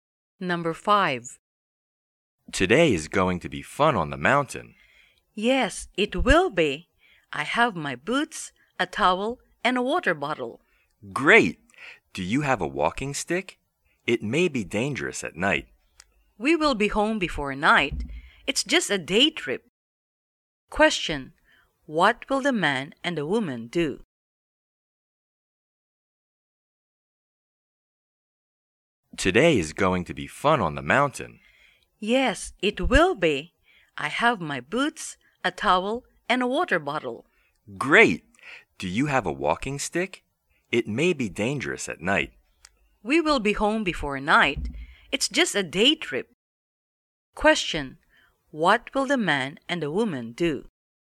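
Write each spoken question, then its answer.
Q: What will the man and the woman do?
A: Go on a day trip to the mountain (hiking)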